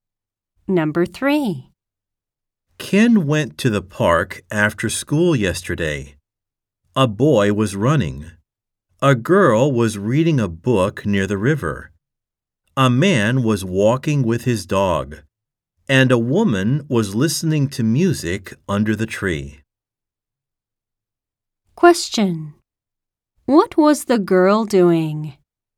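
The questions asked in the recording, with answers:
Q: What was the girl doing?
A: She was reading a book near the river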